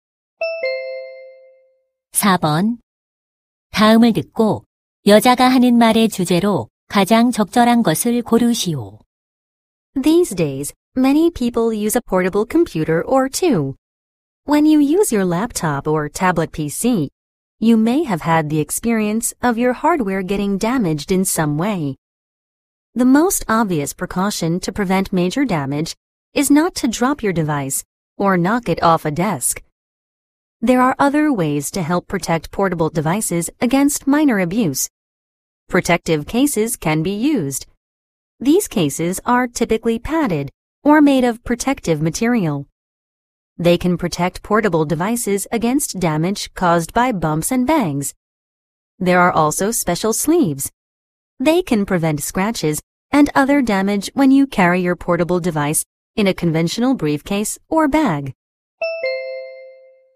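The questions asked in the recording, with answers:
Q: 다음을 듣고 여자가 하는 말의 주제로 가장 적절한 것을 고르시오.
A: 휴대용 기기를 손상으로부터 보호하는 방법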